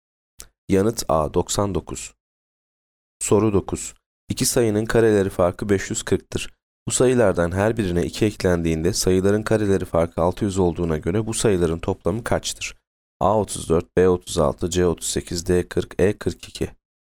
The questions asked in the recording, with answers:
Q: Bu sayılardan her birine 2 eklendiğinde sayıların kareleri farkı 600 olduğuna göre bu sayıların toplamı kaçtır?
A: Yanıt B 36.